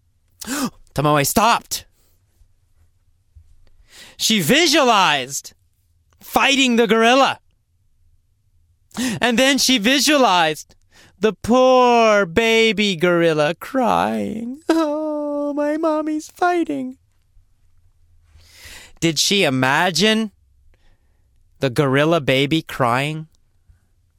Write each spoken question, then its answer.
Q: Did she imagine the gorilla baby crying?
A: Yes, Tomoe visualized.